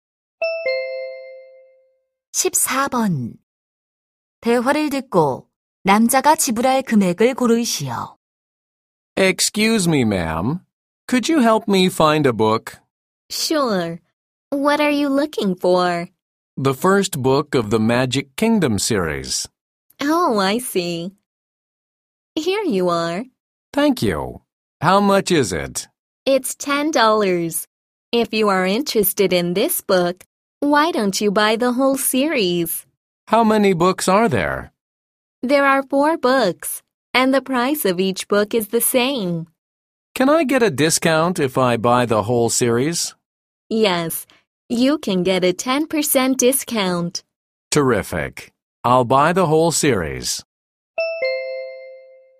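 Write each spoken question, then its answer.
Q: 대화를 듣고 남자가 지불할 금액을 고르시오.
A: $36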